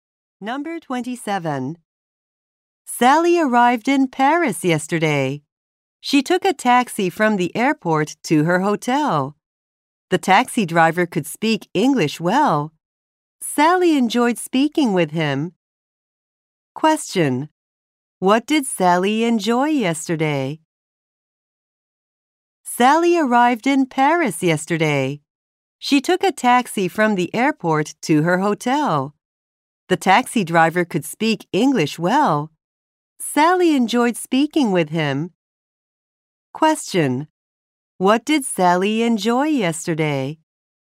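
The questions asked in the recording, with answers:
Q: What did Sally enjoy yesterday?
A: Talking with the taxi driver.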